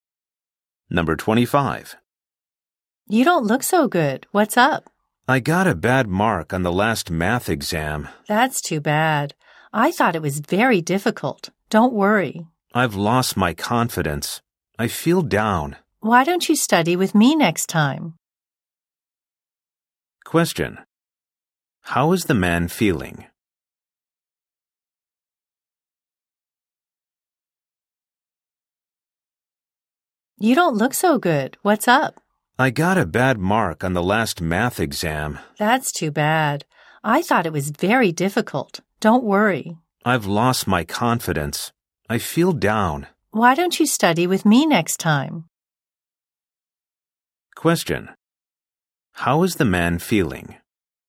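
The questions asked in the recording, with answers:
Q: How is the man feeling?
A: Down; he has lost his confidence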